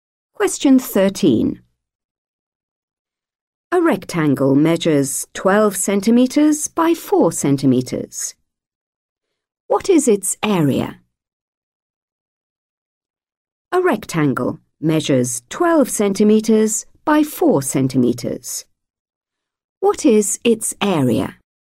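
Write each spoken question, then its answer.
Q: What is its area?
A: 48 square centimetres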